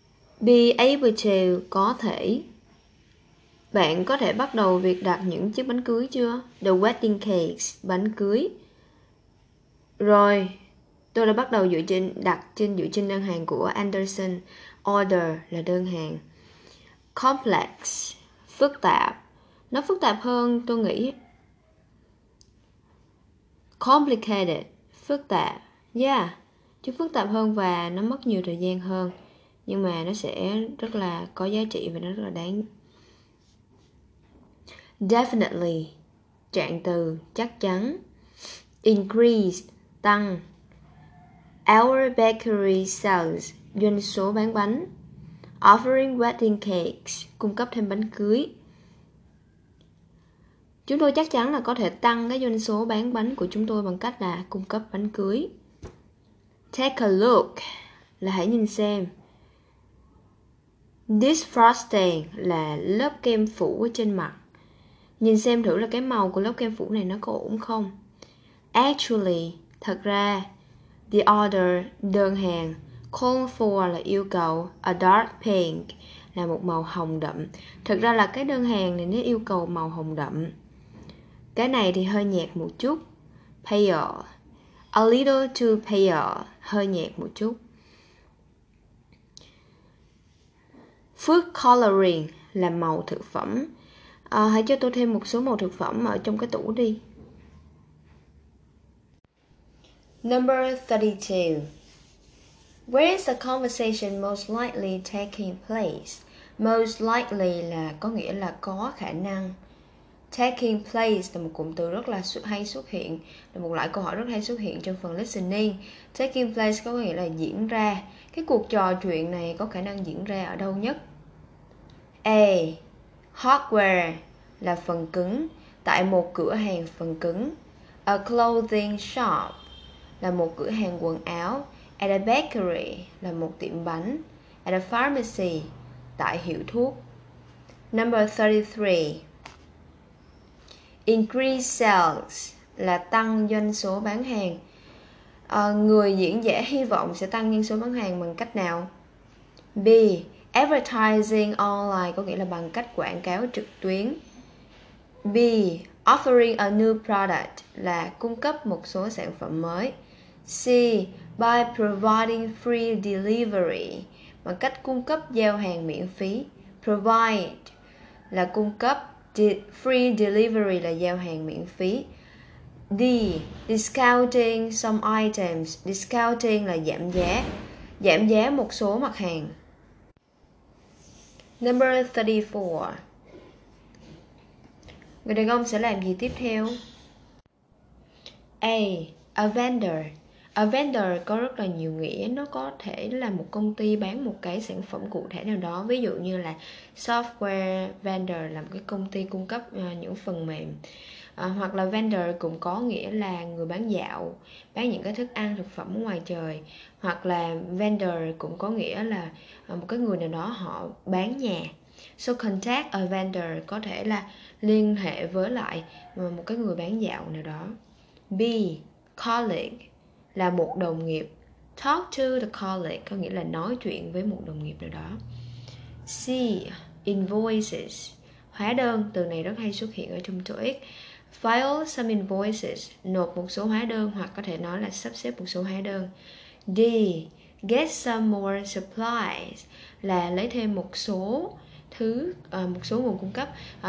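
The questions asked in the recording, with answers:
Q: Where is the conversation most likely taking place?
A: C: At a bakery

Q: Người diễn giả hy vọng sẽ tăng doanh số bán hàng bằng cách nào?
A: B: Offering a new product (cung cấp sản phẩm mới)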